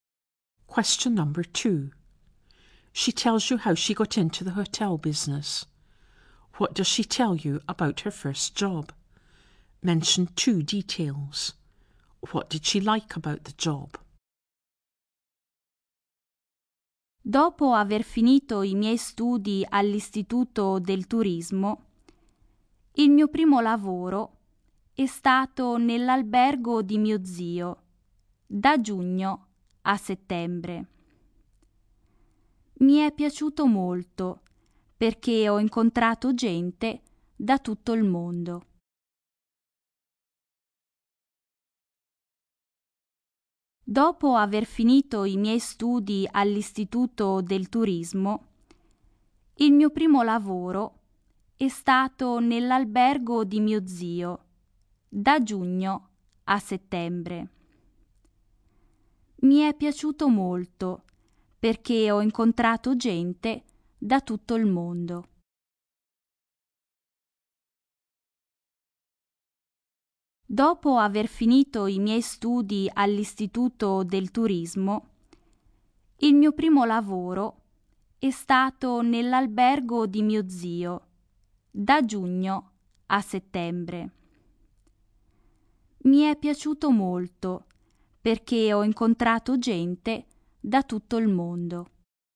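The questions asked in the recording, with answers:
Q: What does she tell you about her first job?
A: It was in her uncle's hotel, from June to September (after finishing at the Tourism Institute)

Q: What did she like about the job?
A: She met people from all over the world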